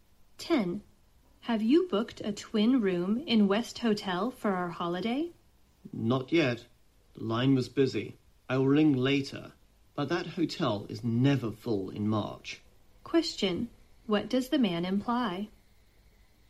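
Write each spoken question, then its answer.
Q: What does the man imply?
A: There's no need to worry about booking the hotel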